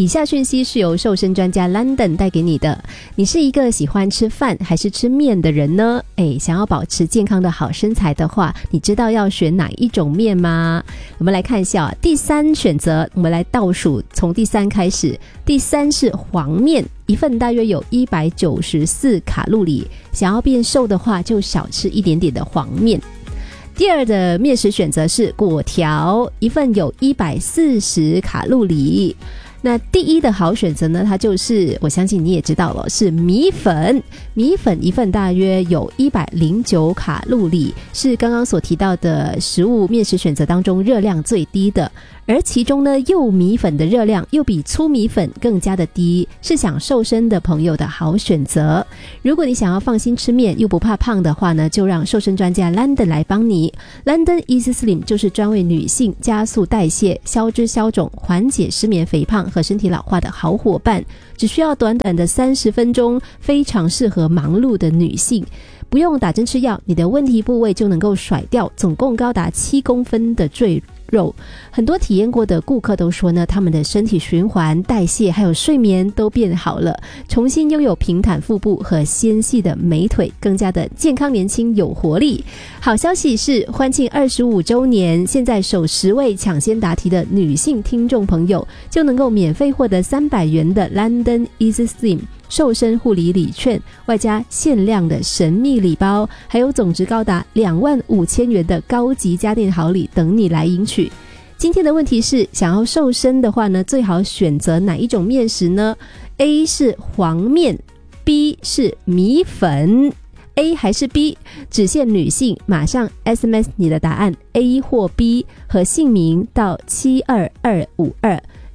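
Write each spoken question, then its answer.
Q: 今天的问题是,想要瘦身的话呢,最好选择哪一种面食呢?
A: B: 米粉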